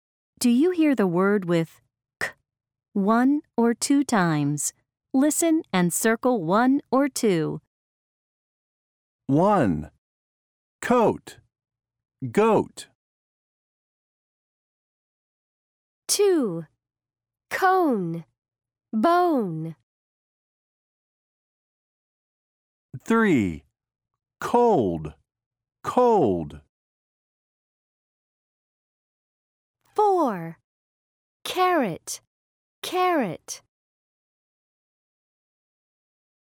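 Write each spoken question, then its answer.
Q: Do you hear the word with k one or two times?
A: one

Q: Do you hear the word with k one or two times?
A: one

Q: Do you hear the word with k one or two times?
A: two

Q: Do you hear the word with k one or two times?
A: two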